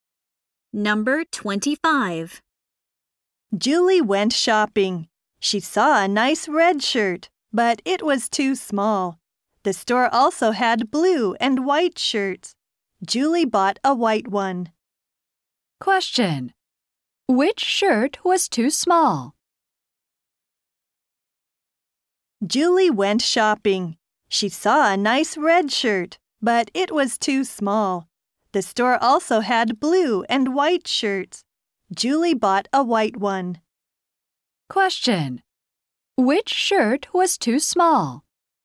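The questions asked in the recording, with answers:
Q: Which shirt was too small?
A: The red one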